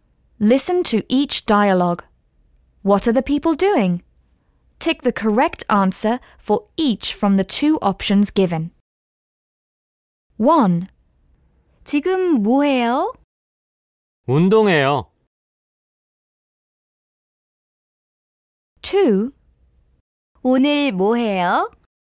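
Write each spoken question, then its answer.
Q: What are the people doing?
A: Exercising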